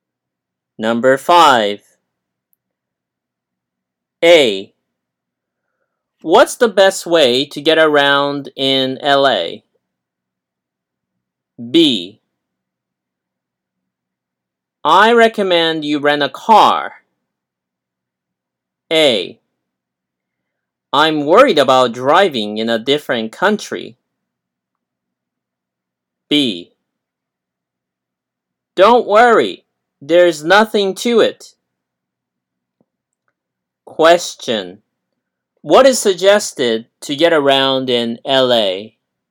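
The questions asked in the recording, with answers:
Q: Question. What is suggested to get around in LA?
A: Renting a car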